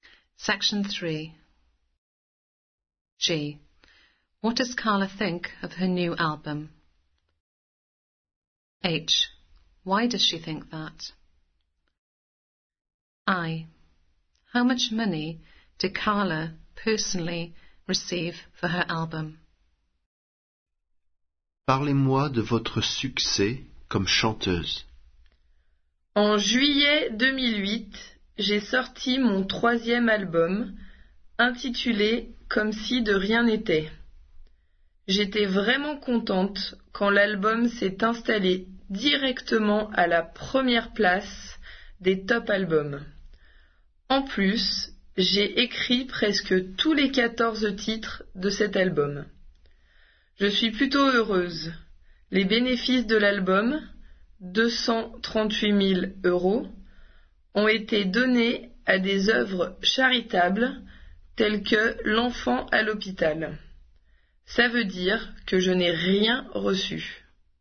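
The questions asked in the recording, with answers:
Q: What does Carla think of her new album?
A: She is really pleased with it

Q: How much money did Carla personally receive for her album?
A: Nothing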